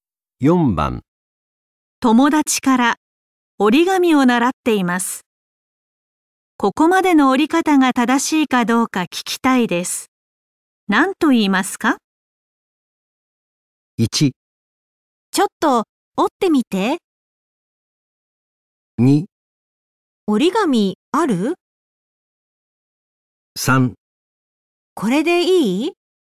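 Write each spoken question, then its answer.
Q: 何と言いますか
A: 3: これでいい?

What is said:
友達から折紙を習っています。ここまでの折り方が正しいかどうか聞きたいです。何と言いますか。
1.ちょっと折ってみて。
2.折紙、ある?
3.これでいい?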